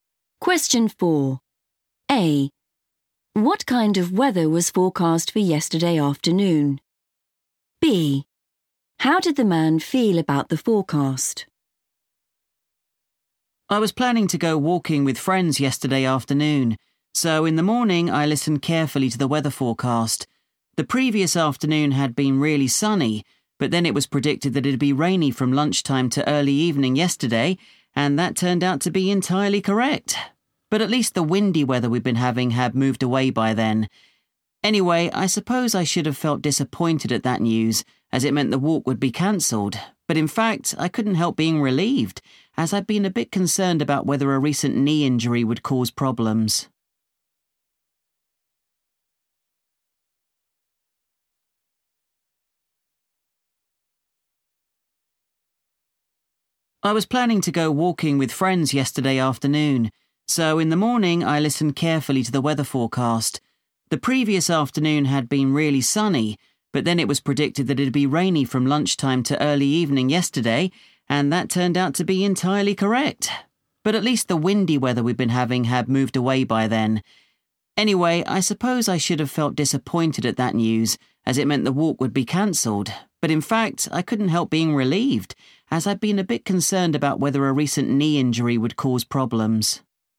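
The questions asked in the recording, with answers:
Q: What kind of weather was forecast for yesterday afternoon?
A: rainy

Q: How did the man feel about the forecast?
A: relieved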